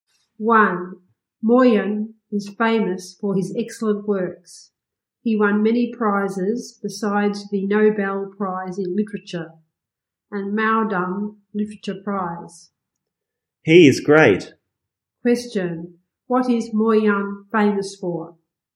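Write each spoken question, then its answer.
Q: What is Moyen famous for?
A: His excellent works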